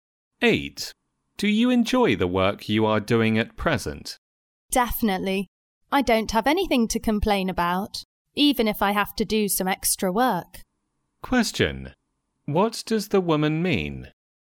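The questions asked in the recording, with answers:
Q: What does the woman mean?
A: She enjoys her work even with extra work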